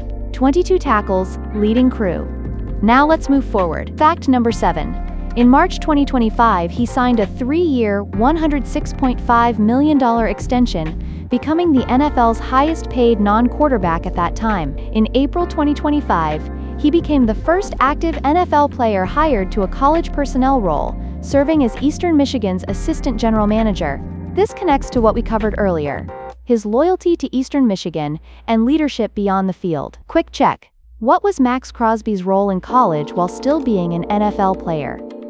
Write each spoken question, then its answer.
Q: What was Max Crosby's role in college while still being an NFL player?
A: Correct answer. Assistant General Manager at Eastern Michigan.